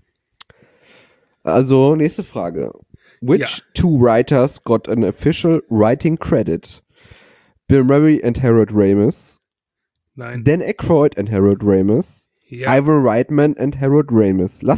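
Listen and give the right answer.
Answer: Dan Aykroyd and Harold Ramis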